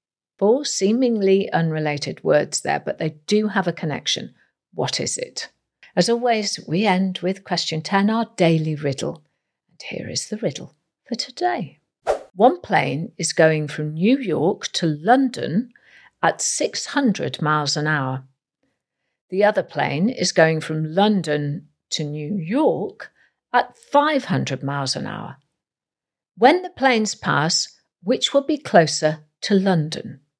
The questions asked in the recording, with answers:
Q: When the planes pass, which will be closer to London?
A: they will both be the same distance from London because when the planes pass, they'll be in the same place geographically.